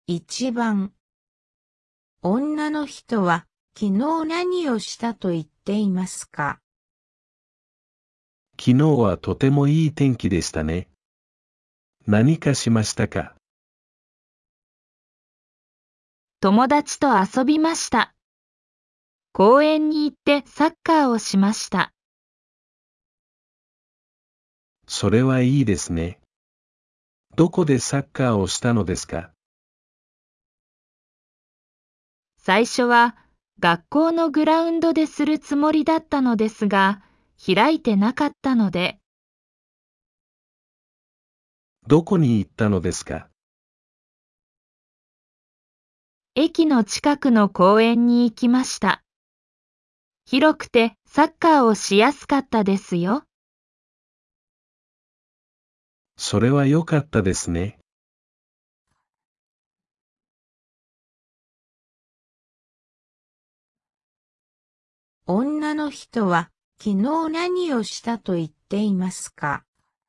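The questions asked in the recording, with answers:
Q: 女の人は昨日何をしたと言っていますか?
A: 友達と駅の近くの公園でサッカーをした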